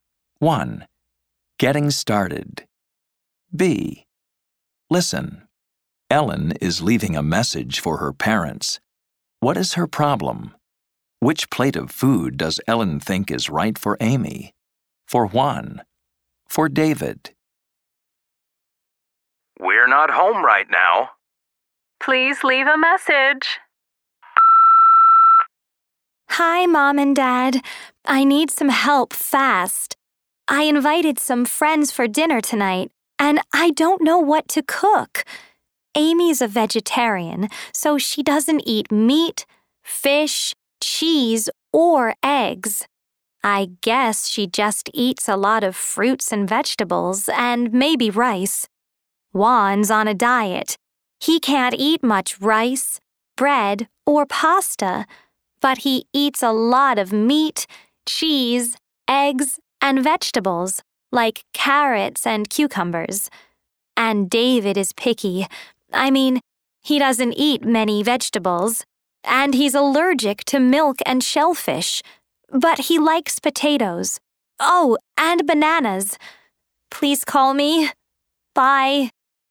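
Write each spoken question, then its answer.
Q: What is her problem?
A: She invited friends for dinner and doesn't know what to cook.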